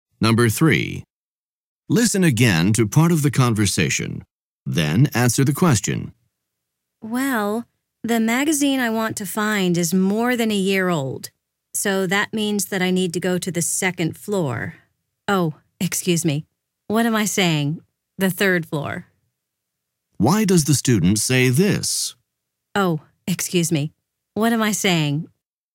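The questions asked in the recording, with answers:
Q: Why does the student say this?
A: To correct her mistake: the older magazines are on the third floor, not the second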